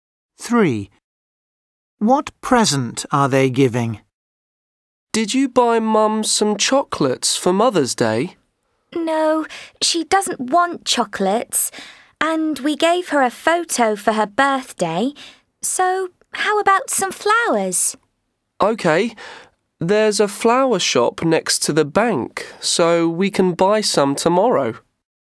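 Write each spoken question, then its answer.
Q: What present are they giving?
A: flowers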